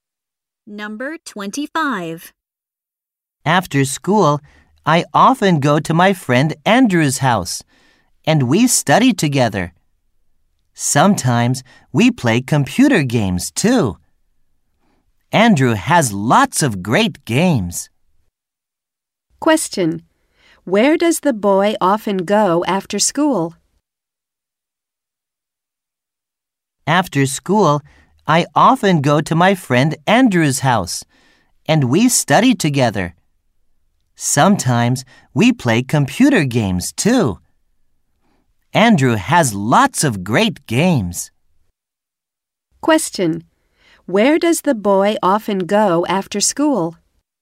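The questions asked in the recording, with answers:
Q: Question. Where does the boy often go after school?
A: To his friend Andrew's house.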